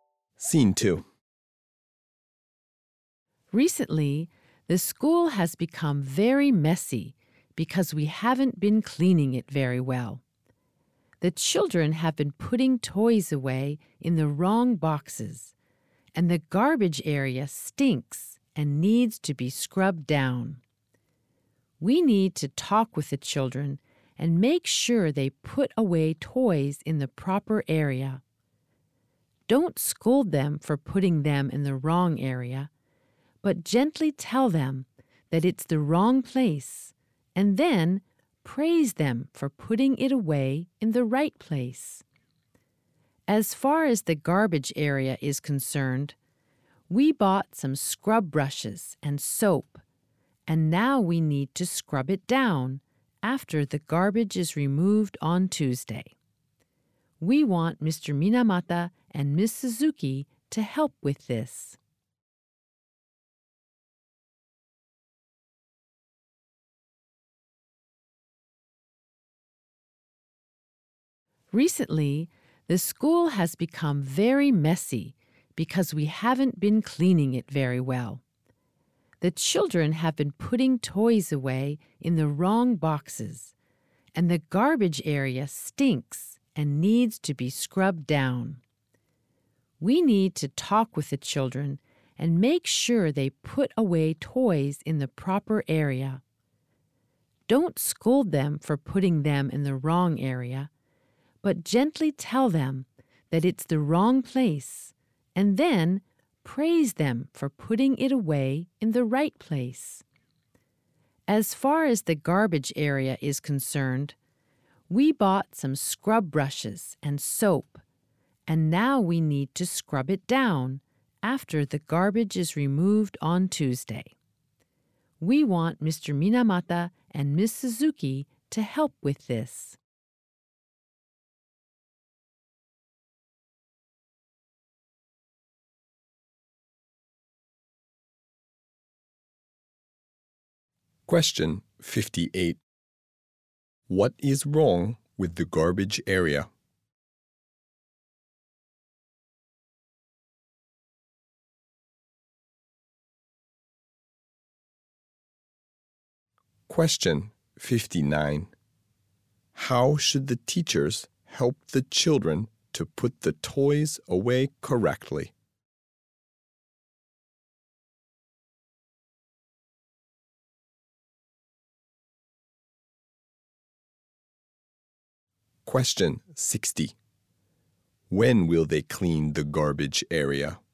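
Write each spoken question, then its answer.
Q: What is wrong with the garbage area?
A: It stinks and needs to be scrubbed down

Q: How should the teachers help the children to put the toys away correctly?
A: Gently tell them it's the wrong place, without scolding, and praise them when they put toys in the right place

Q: When will they clean the garbage area?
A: On Tuesday, after the garbage is removed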